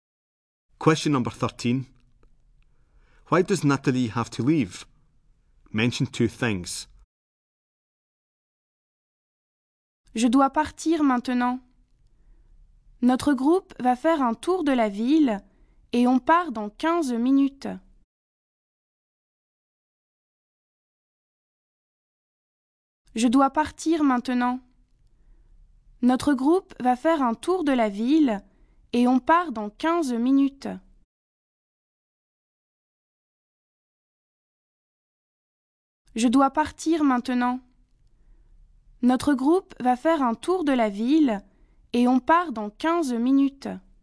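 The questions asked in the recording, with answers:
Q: Why does Natalie have to leave?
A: Her group is going on a tour of the town and they leave in 15 minutes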